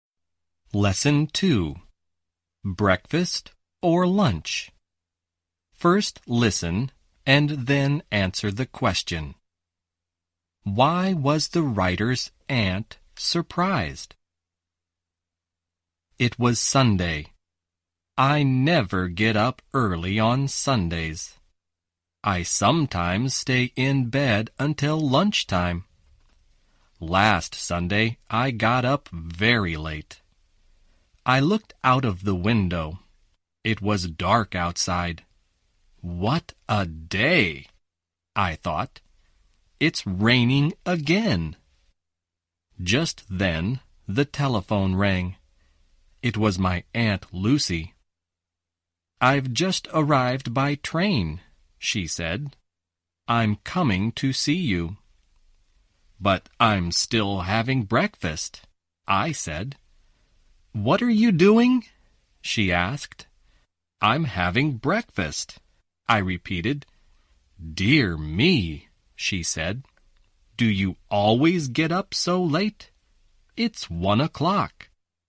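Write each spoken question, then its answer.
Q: Why was the writer's aunt surprised?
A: Because the writer was still having breakfast at 1 o'clock.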